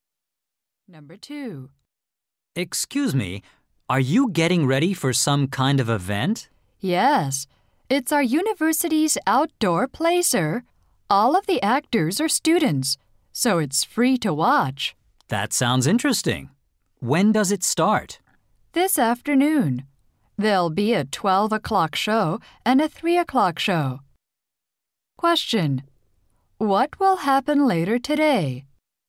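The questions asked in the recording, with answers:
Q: What will happen later today?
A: Students will perform an outdoor play.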